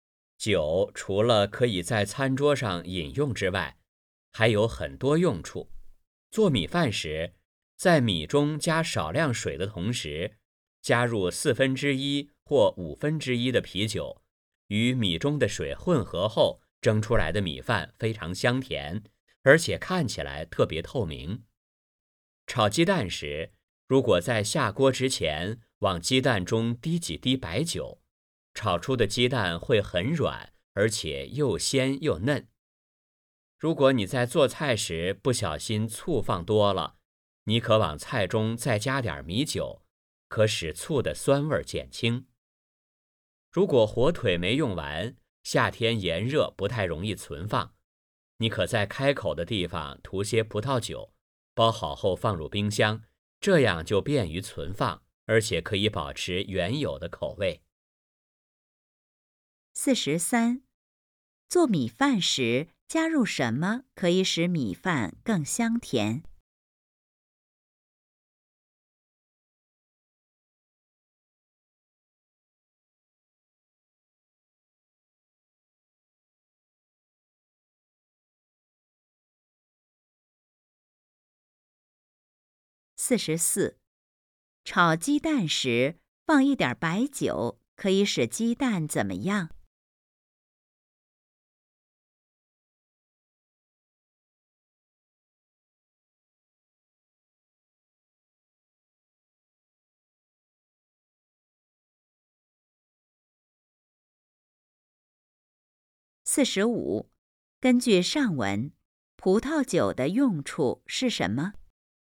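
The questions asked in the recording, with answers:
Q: 做米饭时加入什么可以使米饭更香甜?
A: 啤酒

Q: 炒鸡蛋时放一点白酒可以使鸡蛋怎么样?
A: 很软,又鲜又嫩

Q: 根据上文,葡萄酒的用处是什么?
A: 便于存放火腿,保持原有口味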